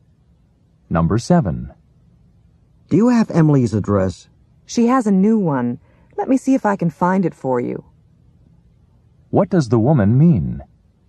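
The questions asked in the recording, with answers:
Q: What does the woman mean?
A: Emily has a new address and she will look for it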